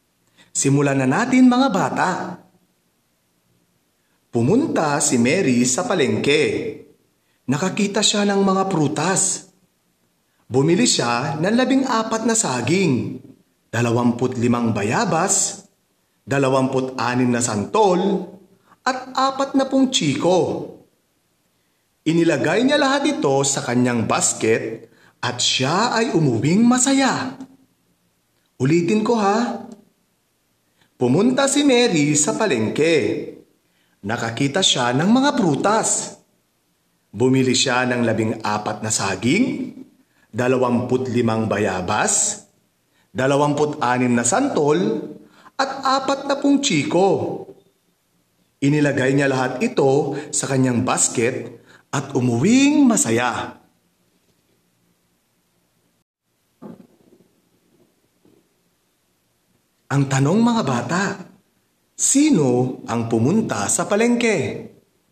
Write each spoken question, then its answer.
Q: Ang tanong mga bata, sino ang pumunta sa palengke?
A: Tama, si Mary ang pumunta sa palengke.